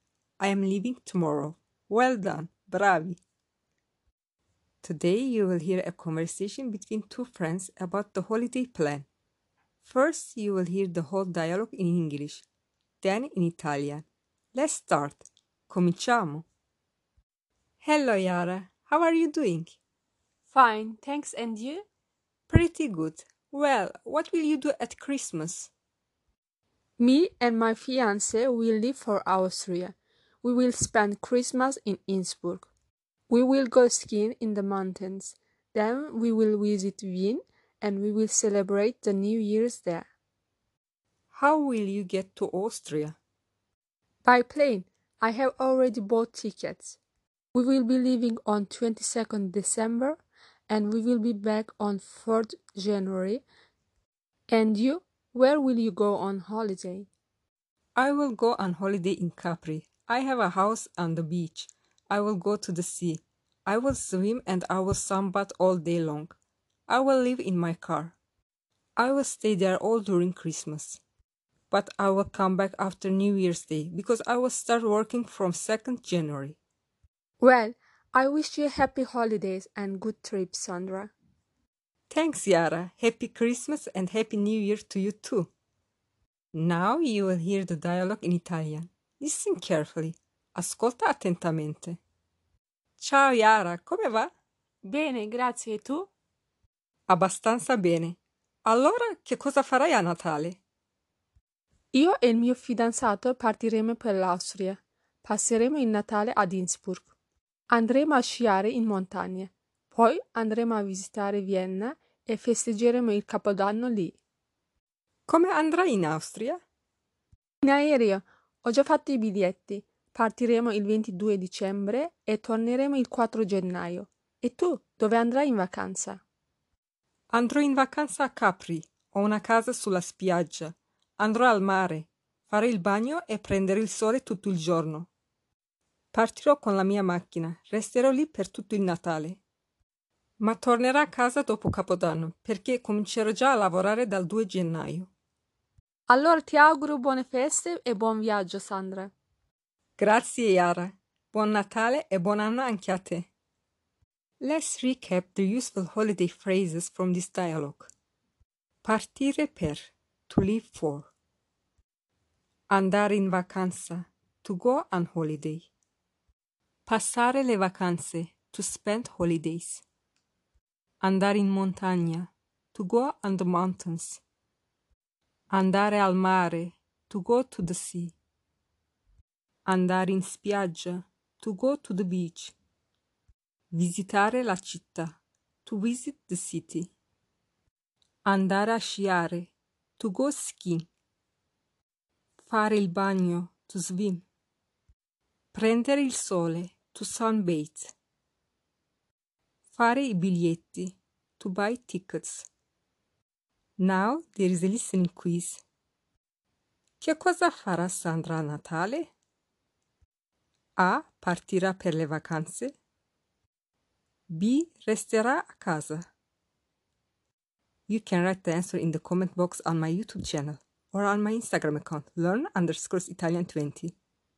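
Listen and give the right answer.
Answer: A: Partirà per le vacanze.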